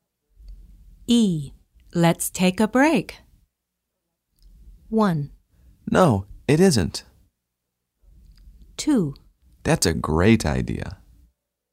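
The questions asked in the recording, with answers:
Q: Let's take a break.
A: 2: That's a great idea.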